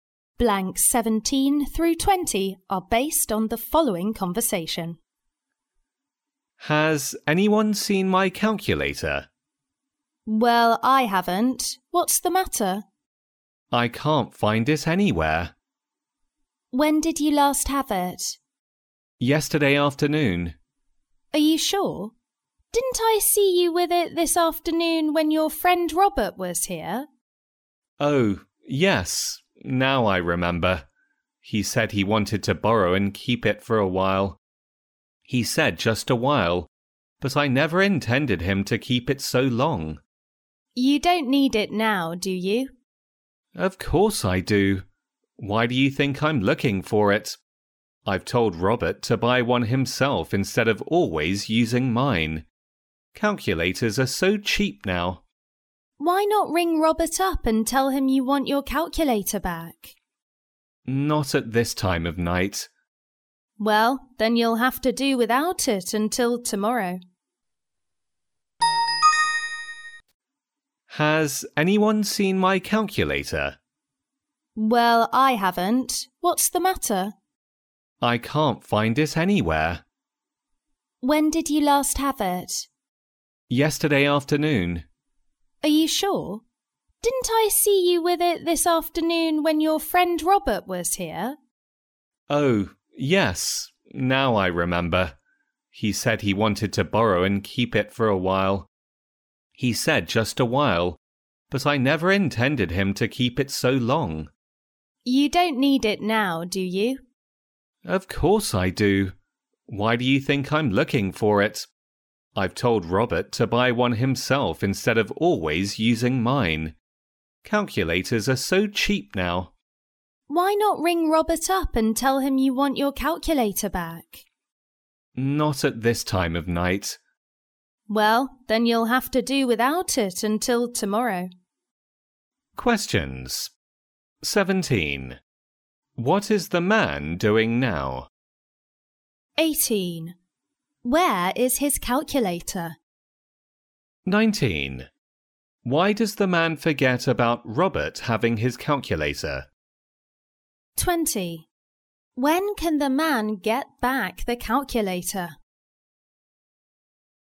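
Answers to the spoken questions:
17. Looking for his calculator
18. Robert has it
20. Tomorrow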